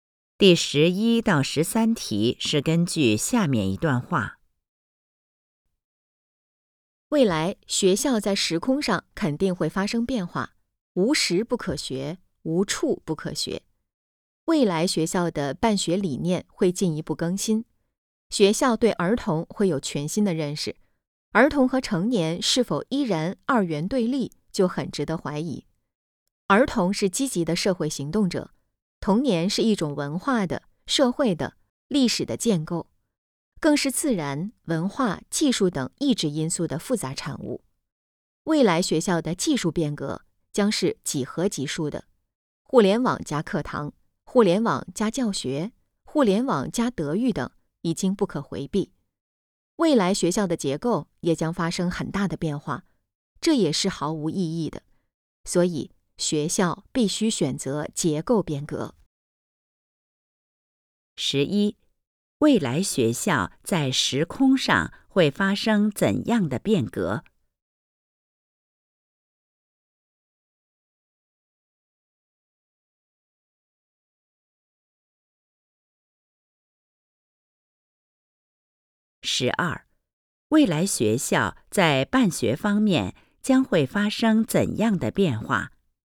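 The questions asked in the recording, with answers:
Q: 十一,未来学校在时空上会发生怎样的变革?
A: 无时不可学,无处不可学

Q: 十二,未来学校在办学方面将会发生怎样的变化?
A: 办学理念会进一步更新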